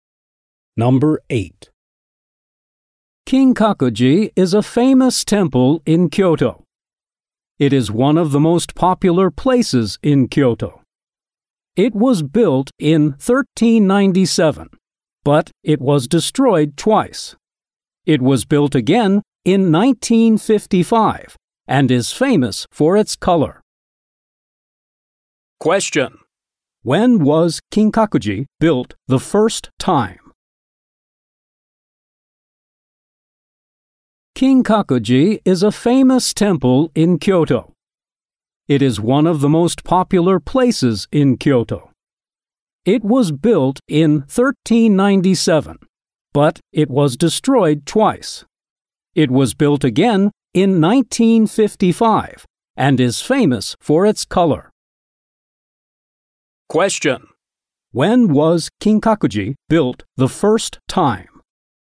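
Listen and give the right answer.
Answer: In 1397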